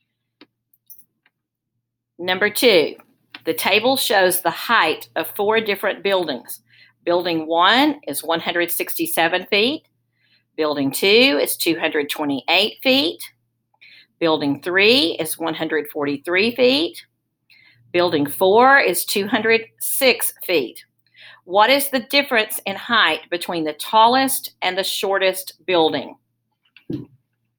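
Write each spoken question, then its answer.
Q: What is the difference in height between the tallest and the shortest building?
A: 85 feet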